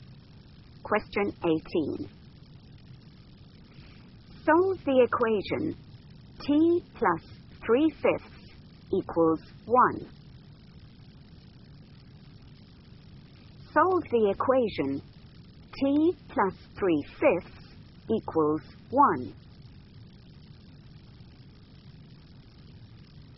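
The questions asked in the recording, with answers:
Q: Solve the equation T plus 3/5 equals 1.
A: 2/5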